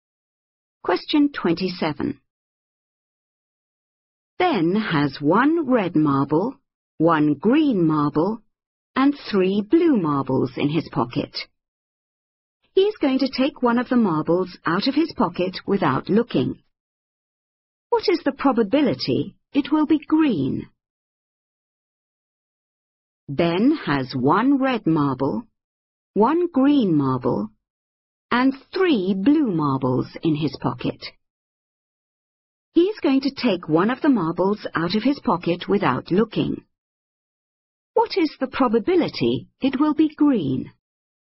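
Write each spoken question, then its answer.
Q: What is the probability it will be green?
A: 1/5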